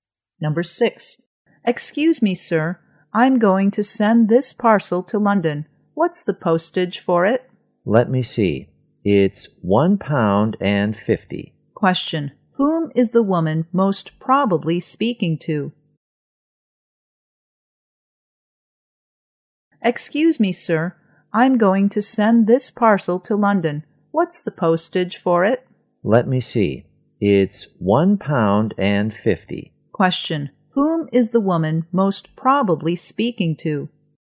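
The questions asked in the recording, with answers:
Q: whom is the woman most probably speaking to?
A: A post office clerk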